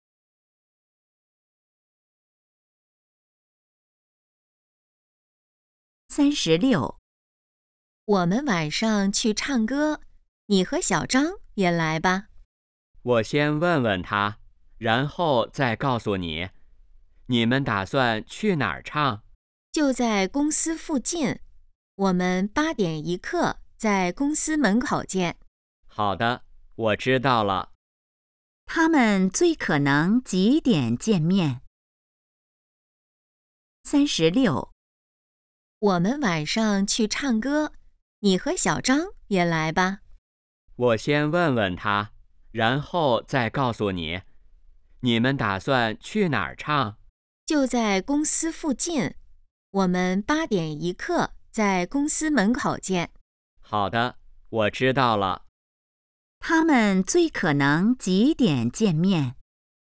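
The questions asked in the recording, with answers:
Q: 他们最可能几点见面?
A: 8点15分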